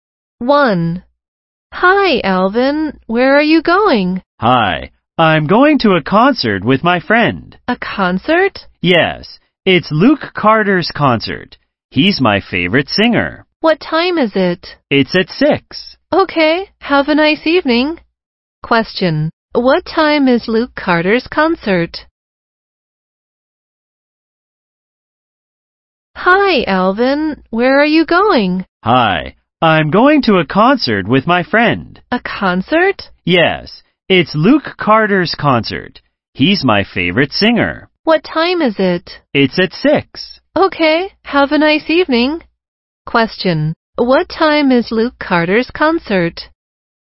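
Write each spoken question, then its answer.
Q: What time is Luke Carter's concert?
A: At 6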